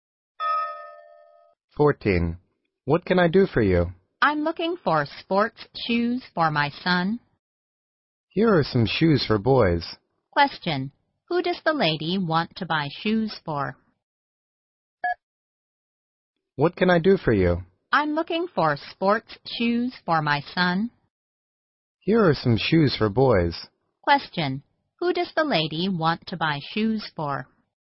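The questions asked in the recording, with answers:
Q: Who does the lady want to buy shoes for?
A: Her son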